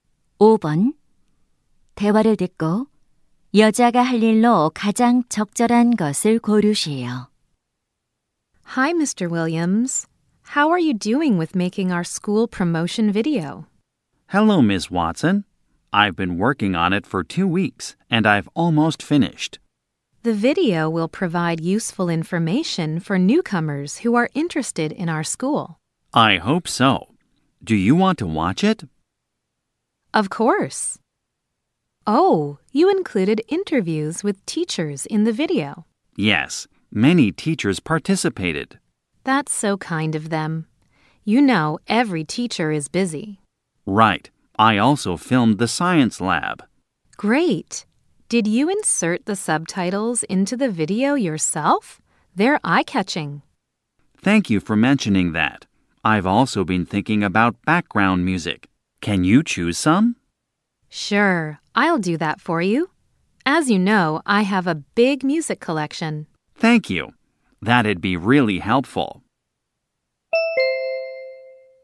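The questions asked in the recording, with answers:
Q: 대화를 듣고 여자가 할 일로 가장 적절한 것을 고르시오.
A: 홍보 영상의 배경 음악 고르기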